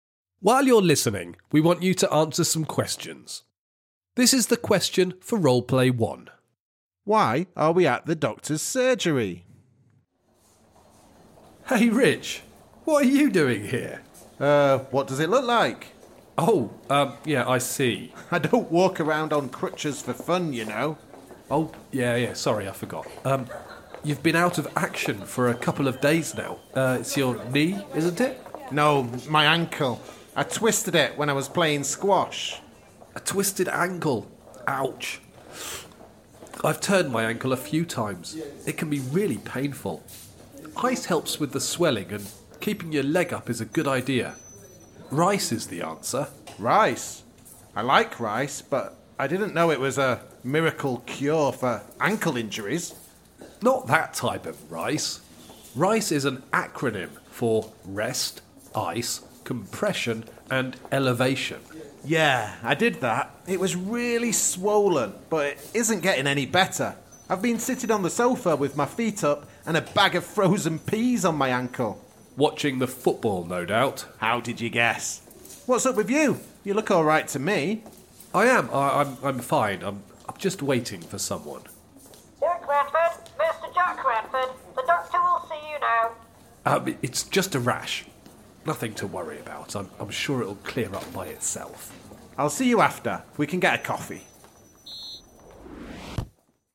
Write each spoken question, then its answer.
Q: Why are we at the doctor's surgery?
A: Well, I have a problem with my ankle.